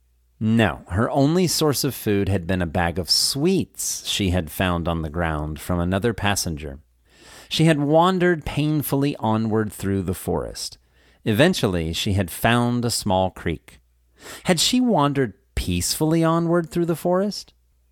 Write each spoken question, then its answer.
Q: Had she wandered peacefully onward through the forest?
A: No, she had wandered painfully onward through the forest.